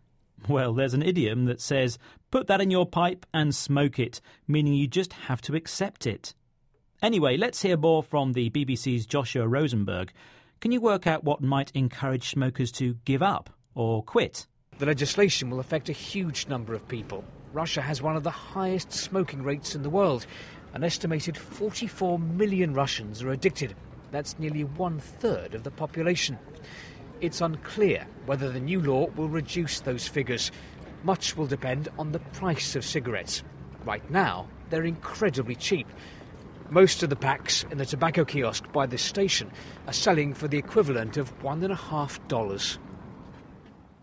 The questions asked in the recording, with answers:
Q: Can you work out what might encourage smokers to give up or quit?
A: So, to help people stop smoking, prices need to rise.